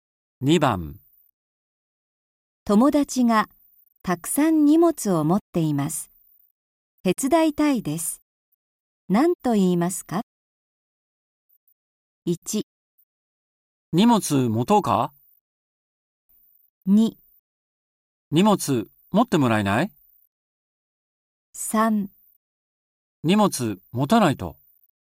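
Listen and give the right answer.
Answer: 1: 荷物持とうか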